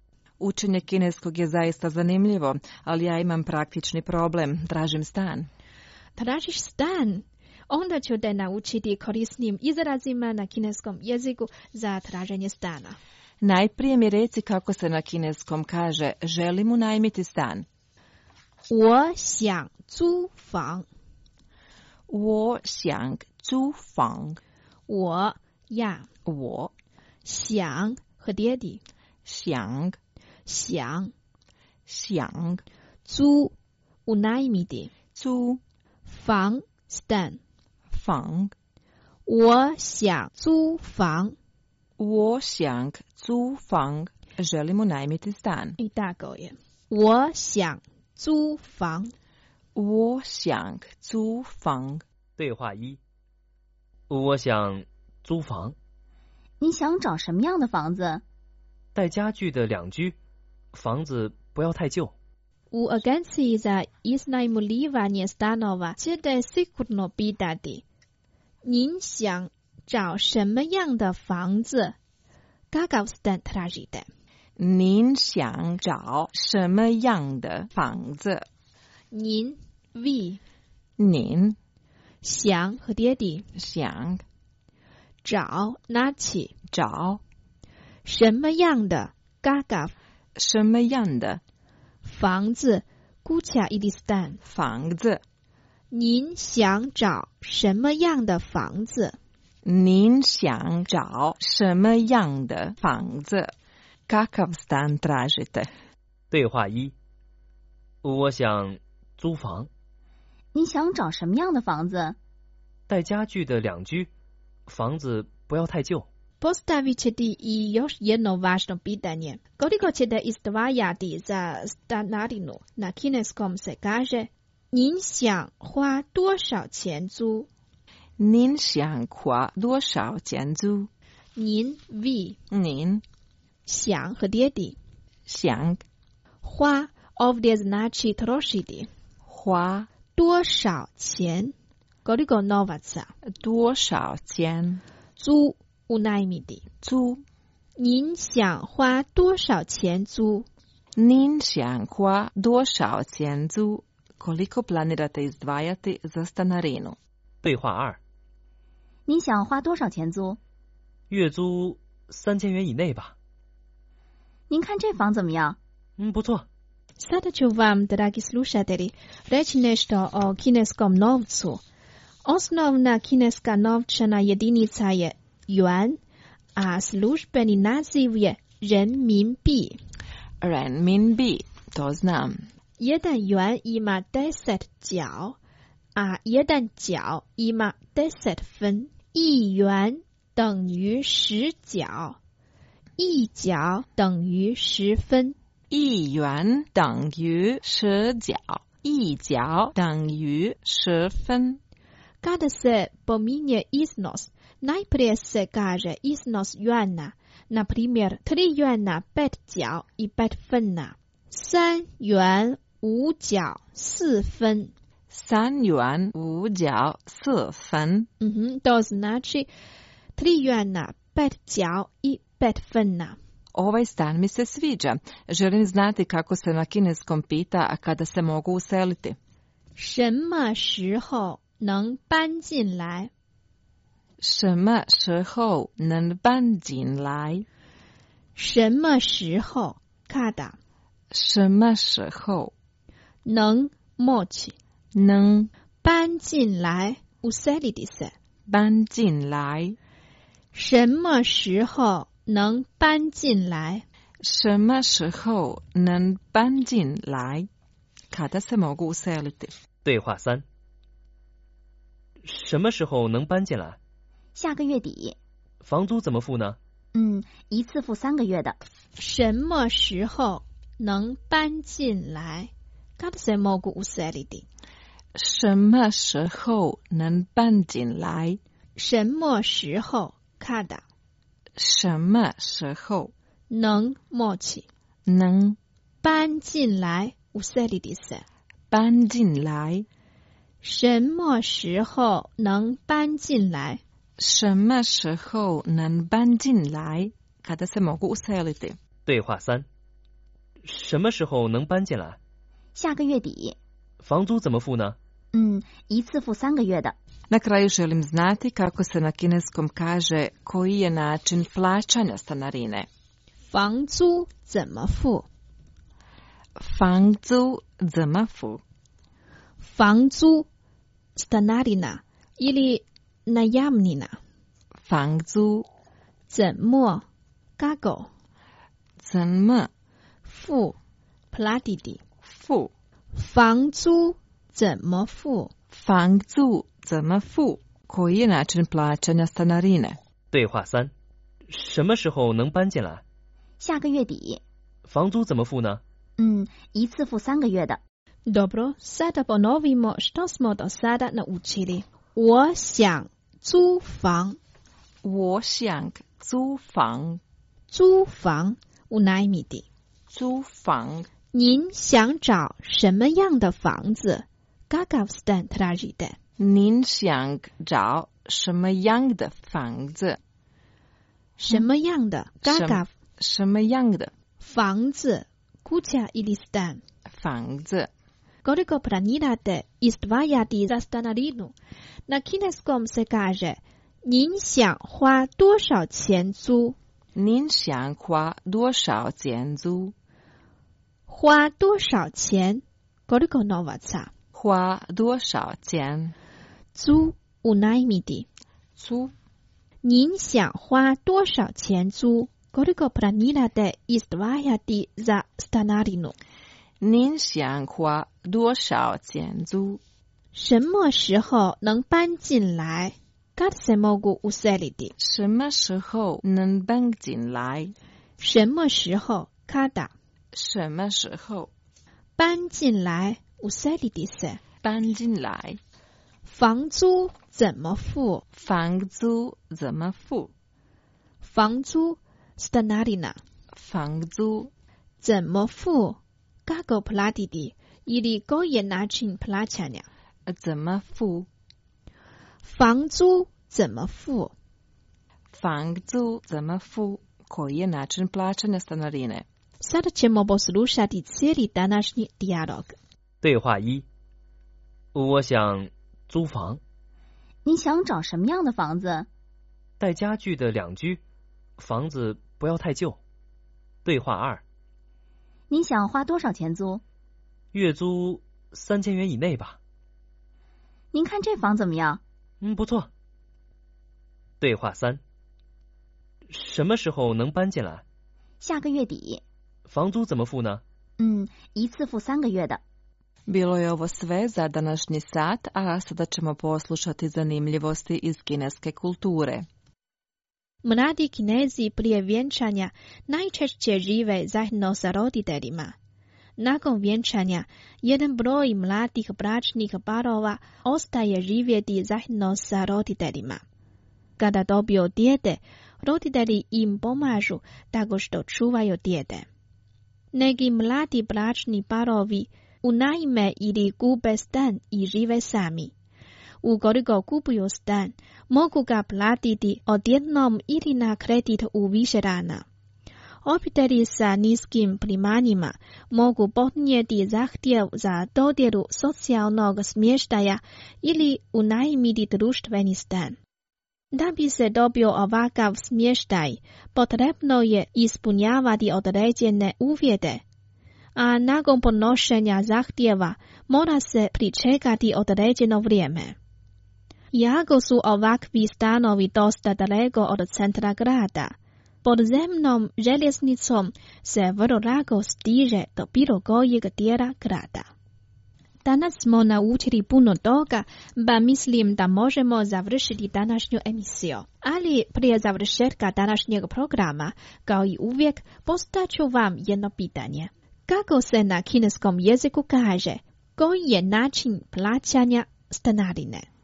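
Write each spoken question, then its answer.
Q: Kako se na kineskom jeziku kaže, koji je način plaćanja stanarine?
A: 房租怎么付?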